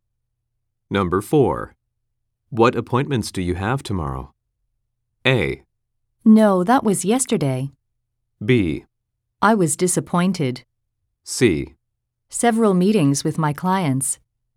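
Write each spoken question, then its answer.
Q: What appointments do you have tomorrow?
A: C: Several meetings with my clients.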